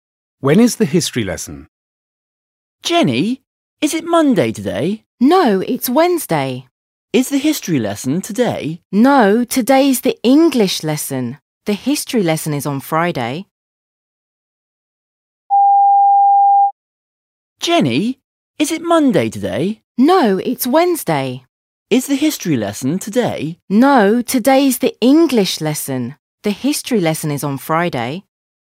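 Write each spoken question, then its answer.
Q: When is the history lesson?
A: On Friday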